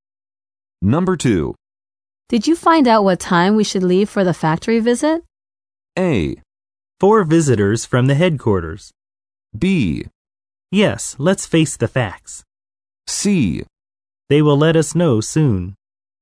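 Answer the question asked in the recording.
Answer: C: They will let us know soon.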